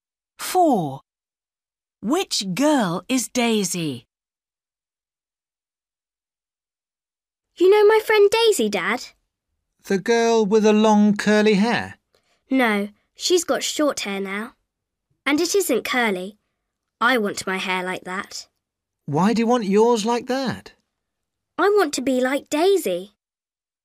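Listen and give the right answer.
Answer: The girl with short, straight hair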